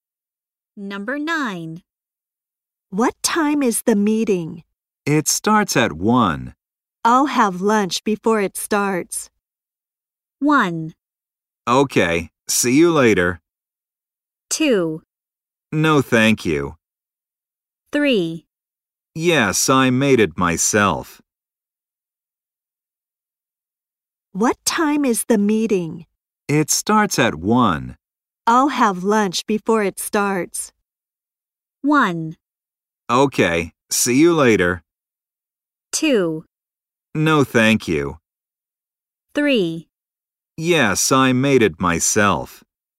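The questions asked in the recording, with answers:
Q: I'll have lunch before it starts.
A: 1: Okay, see you later.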